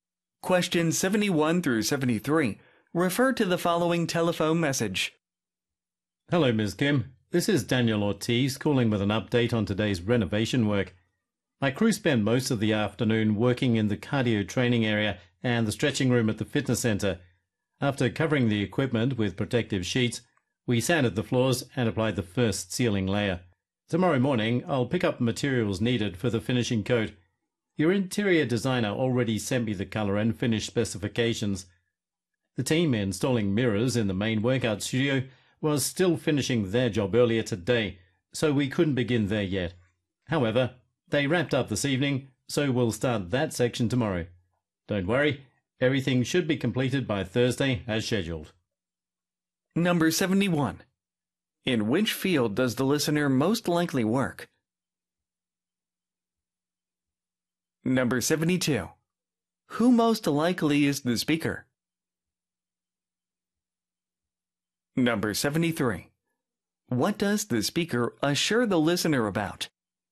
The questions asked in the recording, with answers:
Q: In which field does the listener most likely work?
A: B번 fitness services

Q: Who most likely is the speaker?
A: floor installer가 확실하죠.

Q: What does the speaker assure the listener about?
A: The project will be finished on time.